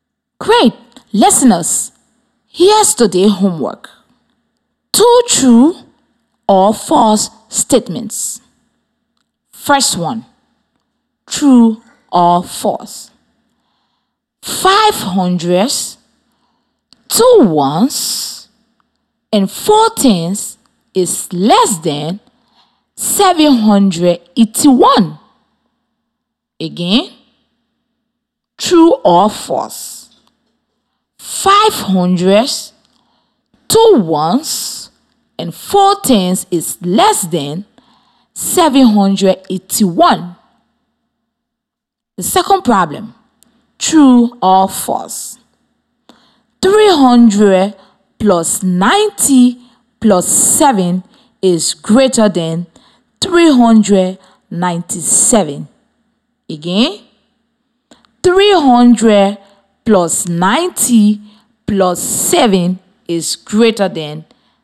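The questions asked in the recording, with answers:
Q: 500, 2 ones, and 4 tens is less than 781.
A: True

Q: 300 plus 90 plus 7 is greater than 397.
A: False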